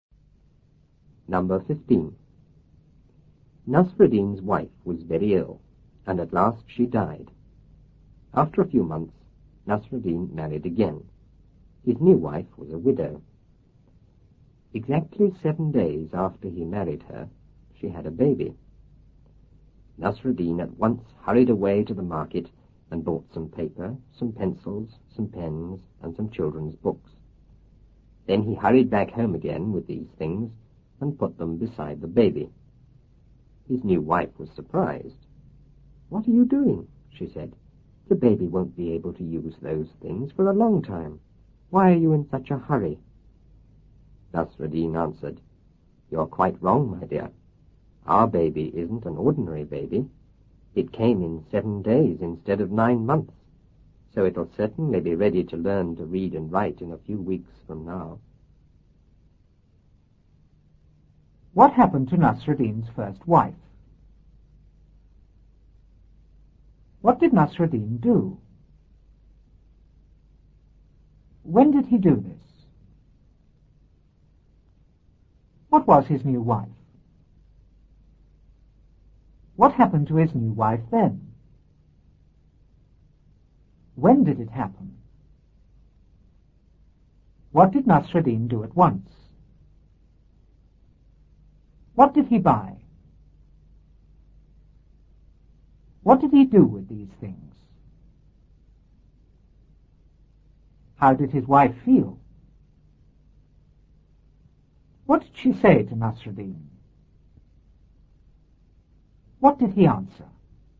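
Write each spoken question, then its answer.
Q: What happened to Nasruddin's first wife?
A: She became very ill and died.

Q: What did Nasruddin do?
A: He married again.

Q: When did he do this?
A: After a few months.

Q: What was his new wife?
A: A widow.

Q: What happened to his new wife then?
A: She had a baby.

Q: When did it happen?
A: Exactly 7 days after he married her.

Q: What did Nasruddin do at once?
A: He hurried away to the market.

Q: What did he buy?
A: Some paper, pencils, pens and children's books.

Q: What did he do with these things?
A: He took them home and put them beside the baby.

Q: How did his wife feel?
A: Surprised.

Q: What did she say to Nasruddin? What did he answer?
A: She asked why he was in such a hurry, since the baby couldn't use those things for a long time; he said the baby wasn't ordinary and, having come in 7 days instead of 9 months, would be ready to learn to read and write in a few weeks.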